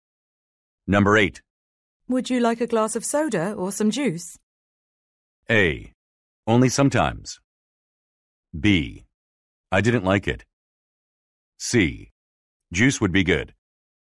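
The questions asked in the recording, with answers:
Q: Would you like a glass of soda or some juice?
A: C: Juice would be good.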